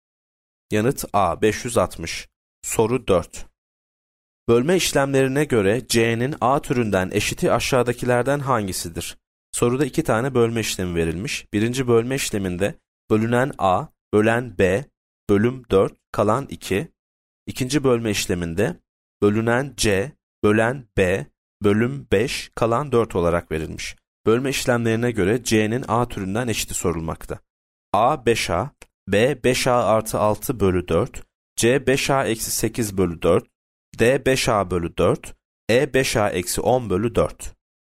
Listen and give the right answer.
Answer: Yanıt B 5A artı 6 bölü 4.